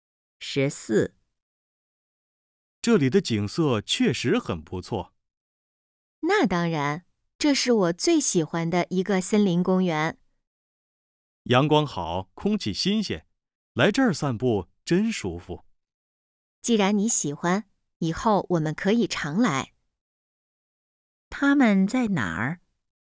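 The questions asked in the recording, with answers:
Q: 他们在哪儿?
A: 森林公园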